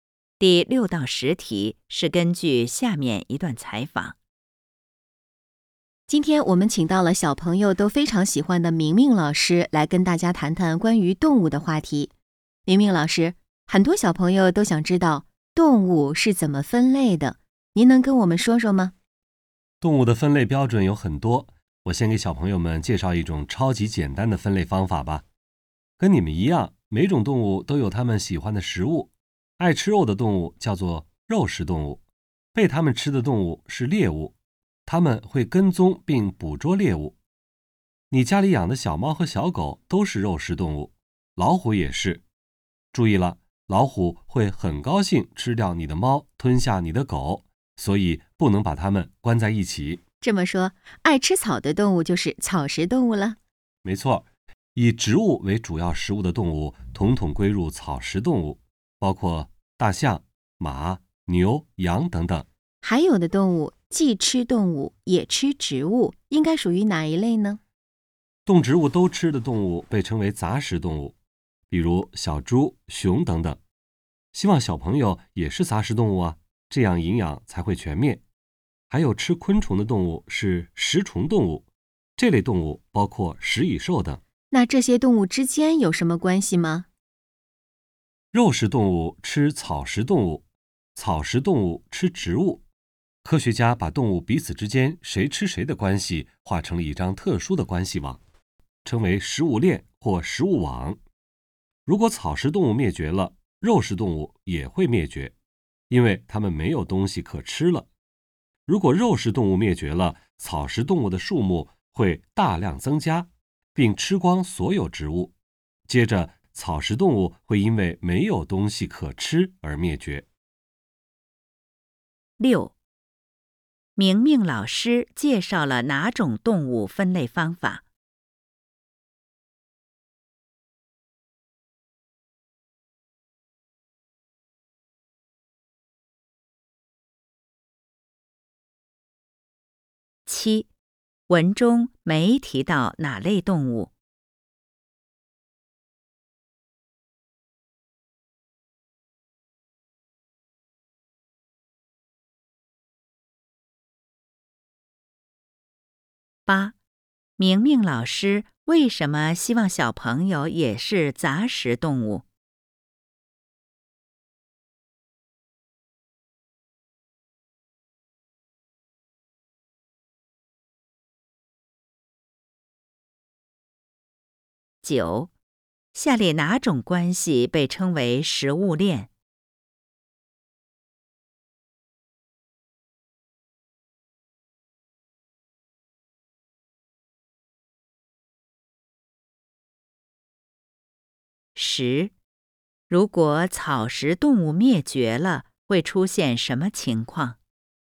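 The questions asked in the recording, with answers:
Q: 明明老师介绍了哪种动物分类方法?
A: 按动物吃的食物分类

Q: 明明老师为什么希望小朋友也是杂食动物?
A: 这样营养才会全面

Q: 下列哪种关系被称为食物链?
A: 动物彼此之间谁吃谁的关系

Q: 如果草食动物灭绝了,会出现什么情况?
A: 肉食动物也会灭绝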